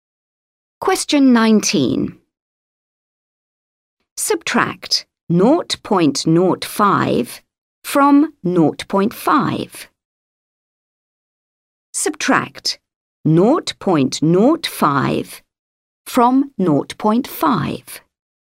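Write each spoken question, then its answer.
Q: Subtract 0.05 from 0.5.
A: 0.45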